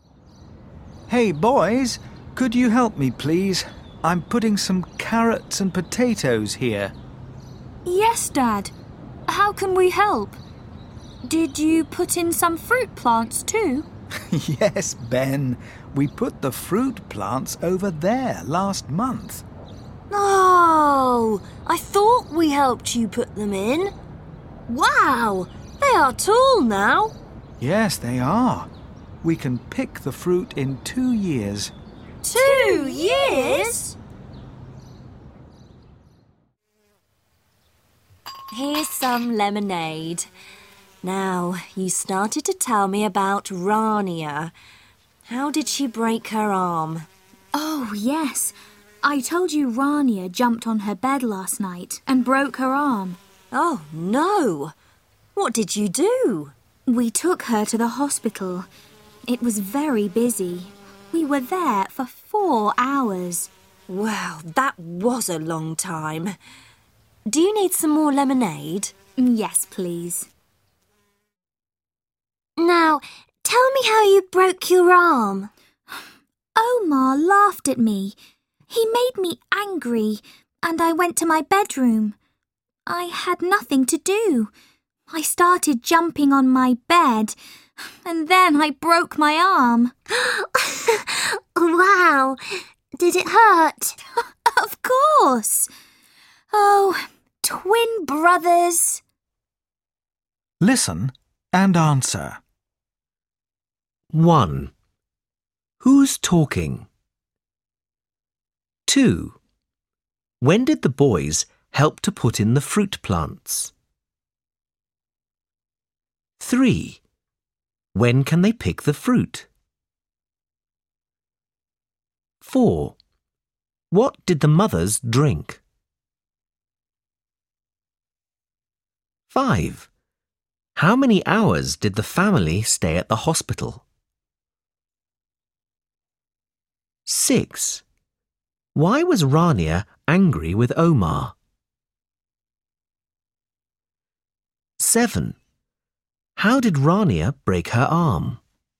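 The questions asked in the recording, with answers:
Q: When did the boys help to put in the fruit plants?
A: Last month

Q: When can they pick the fruit?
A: In 2 years

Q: What did the mothers drink?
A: Lemonade

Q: How many hours did the family stay at the hospital?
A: 4 hours

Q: Why was Rania angry with Omar?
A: Omar laughed at her

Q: How did Rania break her arm?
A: She jumped on her bed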